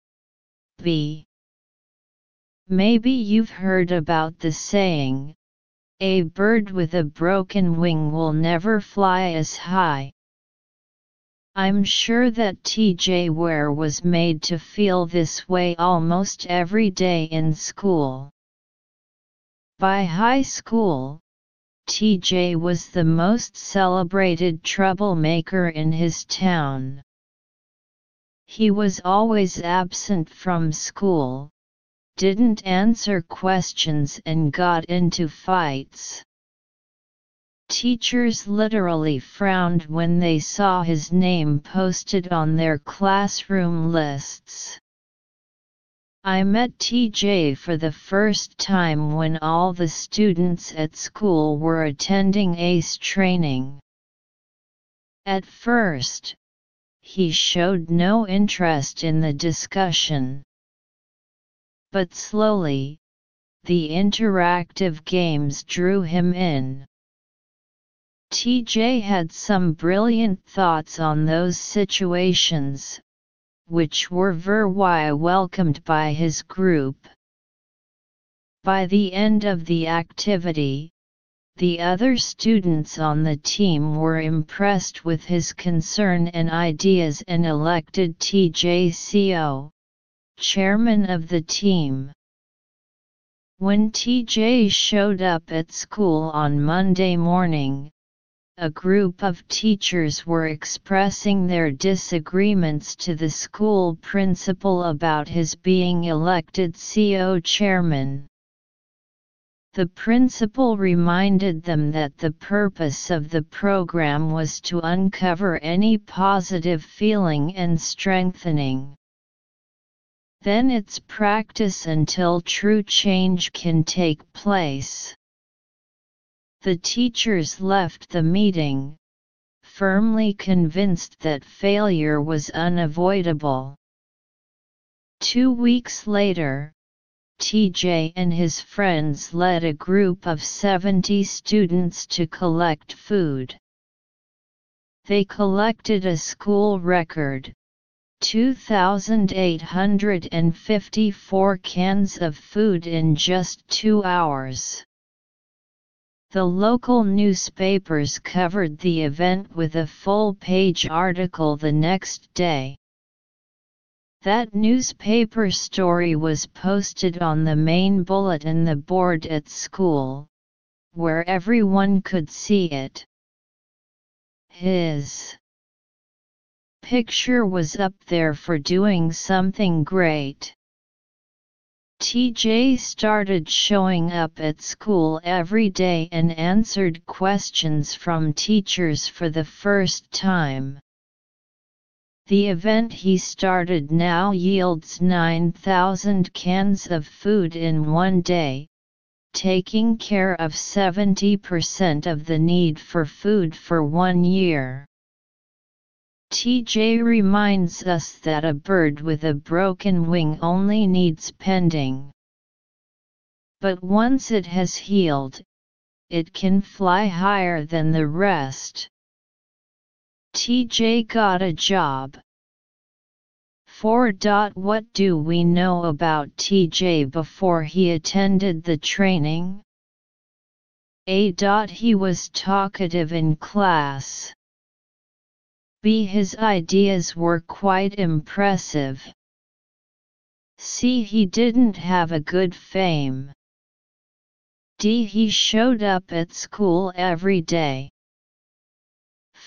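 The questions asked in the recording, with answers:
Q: What do we know about TJ before he attended the training?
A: C: He didn't have a good fame.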